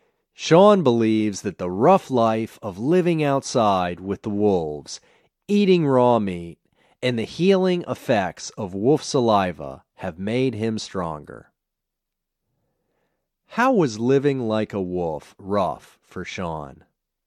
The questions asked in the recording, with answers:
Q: How was living like a wolf rough for Sean?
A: Living outside and eating raw meat was rough.